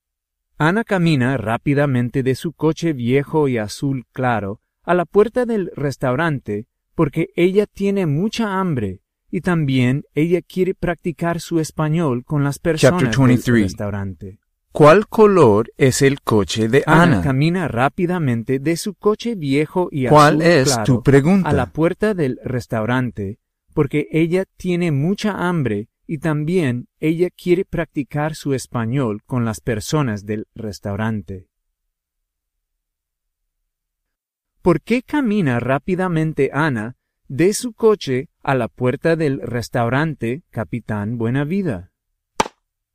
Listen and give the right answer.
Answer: Ana camina rápidamente de su coche a la puerta del restaurante porque ella quiere practicar su español con las personas del restaurante y también ella tiene mucha hambre.